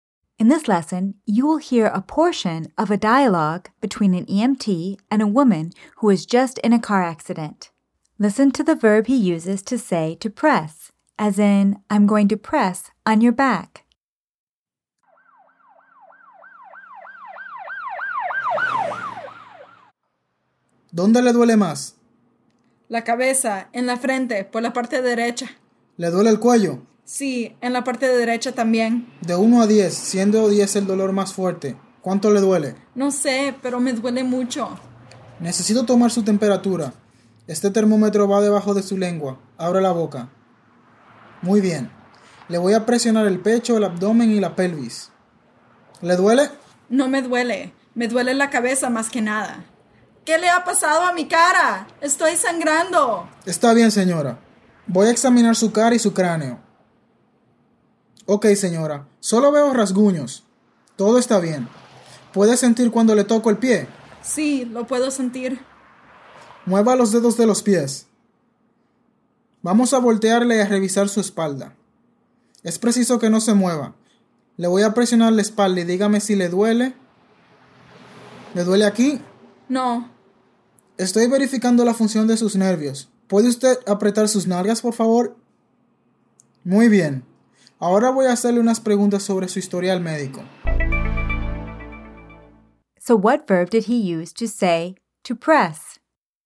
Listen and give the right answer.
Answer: Presionar.